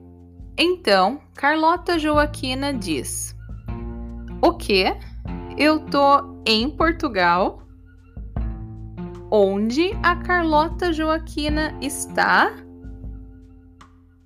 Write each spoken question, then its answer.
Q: Onde a Carlota Joaquina está?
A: Portugal. Ela está em Portugal.